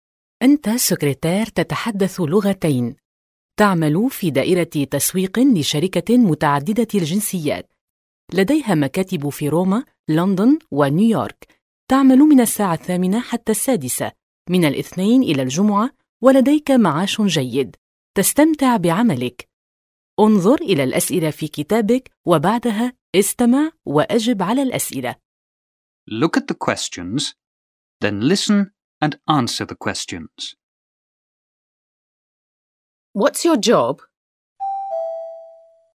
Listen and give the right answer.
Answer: Me? I'm in marketing.